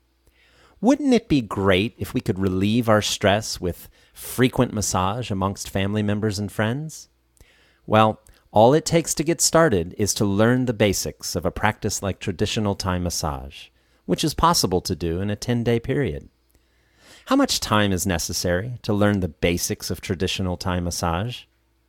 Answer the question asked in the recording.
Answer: It's possible to learn the basics of Thai massage in a 10-day period.